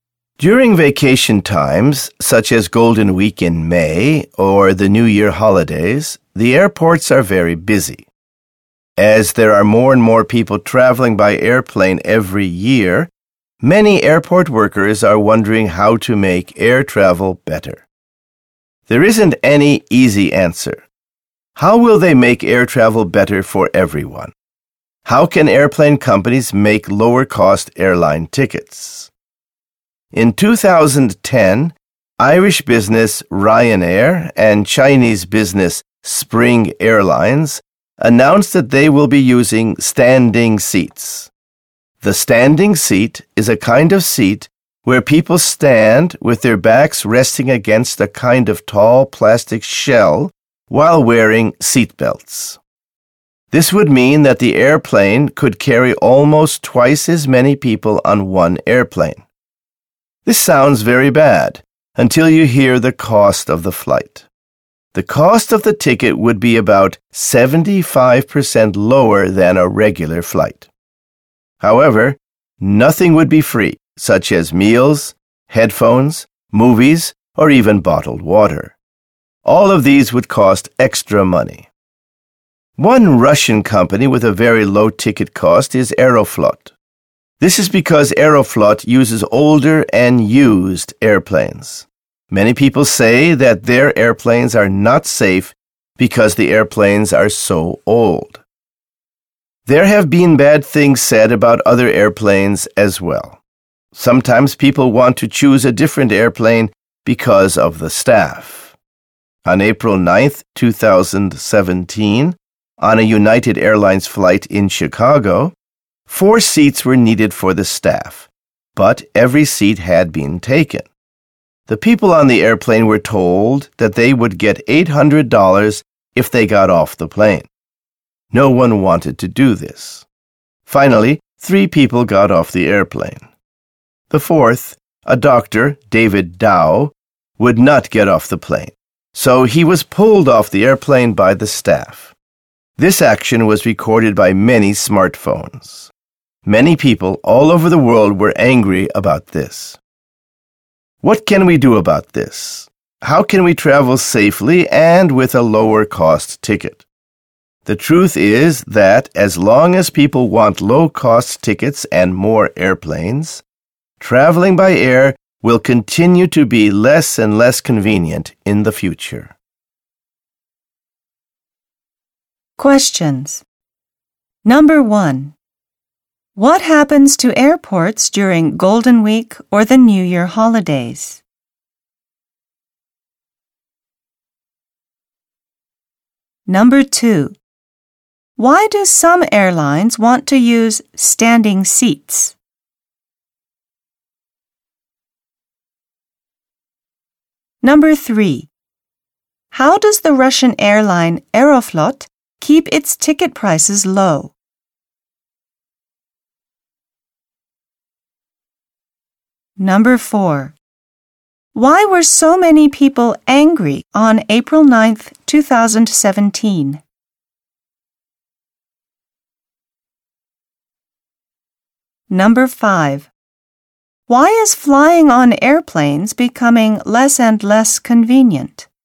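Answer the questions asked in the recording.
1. They are very busy.
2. To carry almost twice as many people and make tickets cheaper (about 75% lower).
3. It uses older, used airplanes.
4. A doctor, David Dao, was pulled off a United Airlines plane by the staff.
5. Because people want low-cost tickets and more airplanes.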